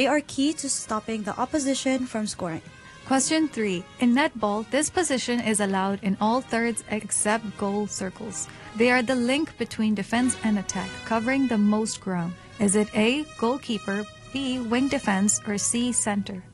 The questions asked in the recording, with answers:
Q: In netball, this position is allowed in all thirds except goal circles. They are the link between defense and attack, covering the most ground. Is it A, goalkeeper, B, wing defense, or C, center?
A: The correct answer is C, center.